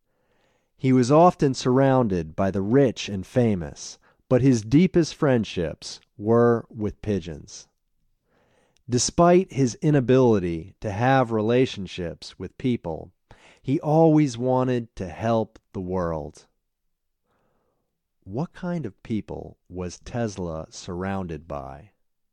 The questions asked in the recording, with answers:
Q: What kind of people was Tesla surrounded by?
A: Tesla was surrounded by the rich and famous.